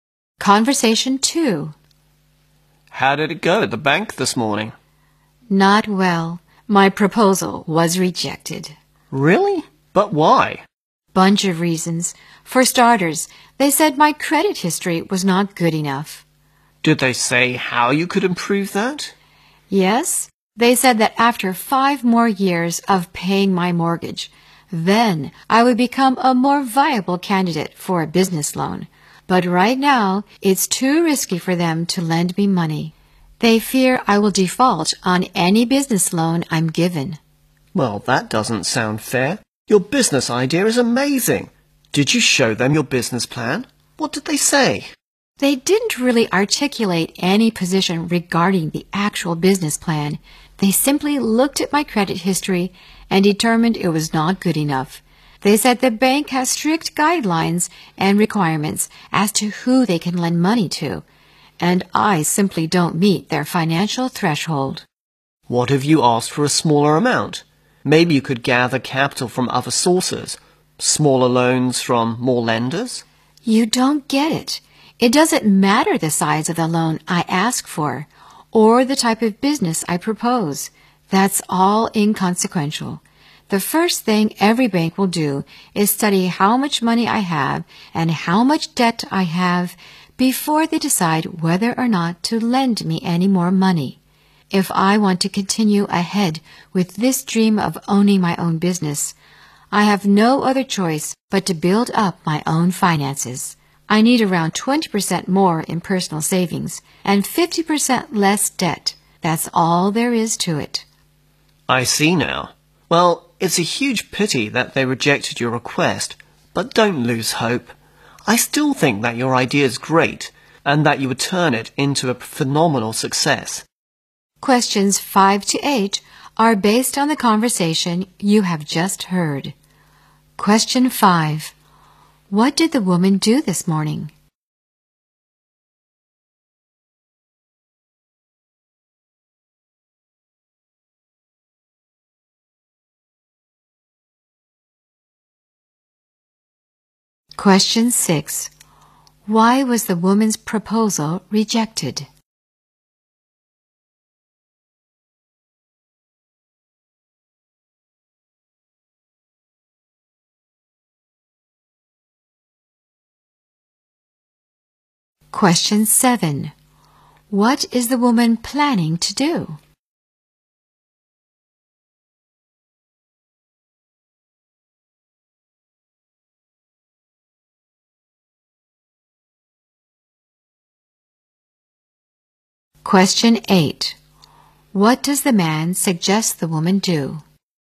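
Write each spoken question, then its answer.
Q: What did the woman do this morning?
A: She went to the bank to apply for a business loan.

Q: Why was the woman's proposal rejected?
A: Her credit history was not good enough.

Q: What is the woman planning to do?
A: Build up her own finances: save more and cut her debt.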